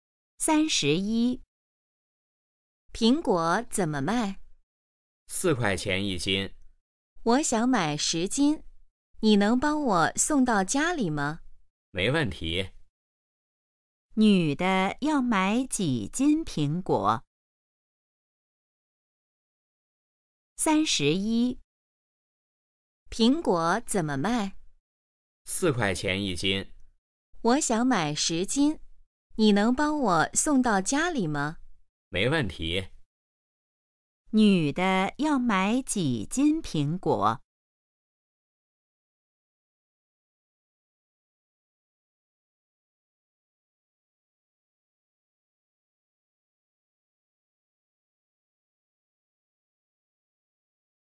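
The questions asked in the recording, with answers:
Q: 女的要买几斤苹果?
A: 10斤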